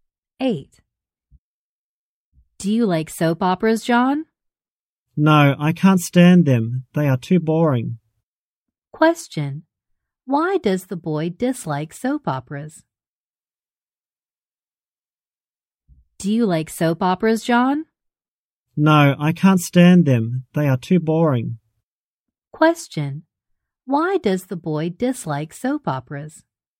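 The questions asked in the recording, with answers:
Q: Why does the boy dislike soap operas?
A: They are too boring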